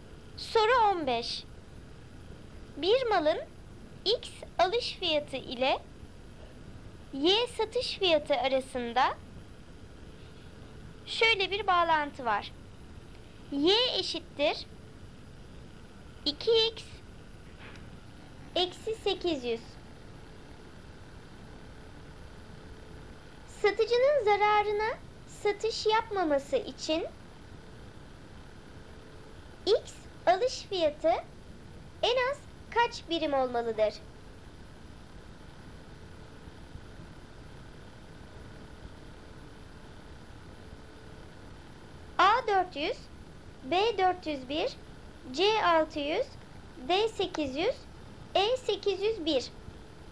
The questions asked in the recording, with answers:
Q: X alış fiyatı en az kaç birim olmalıdır?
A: Doğru cevap D800.